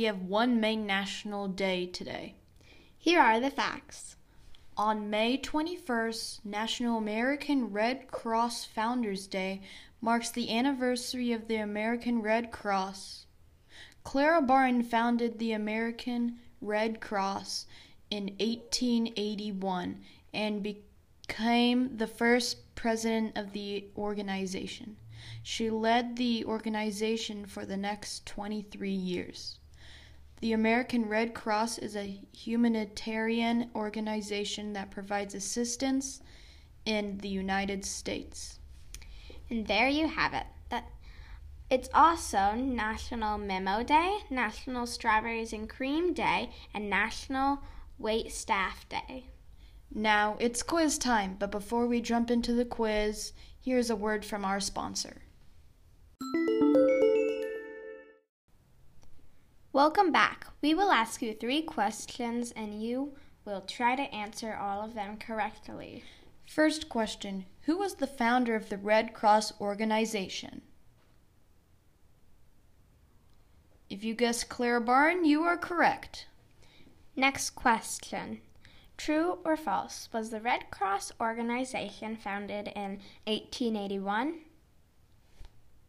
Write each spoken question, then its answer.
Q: True or false, was the Red Cross organization founded in 1881?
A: If you said true, you're right.